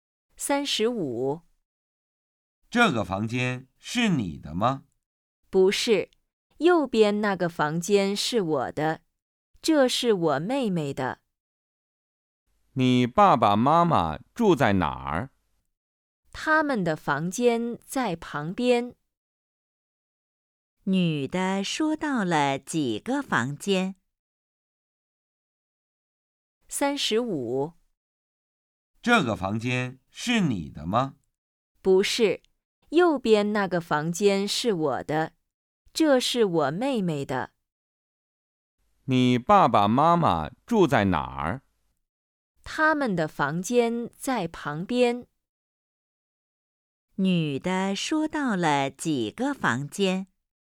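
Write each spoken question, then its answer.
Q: 女的说到了几个房间?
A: 三个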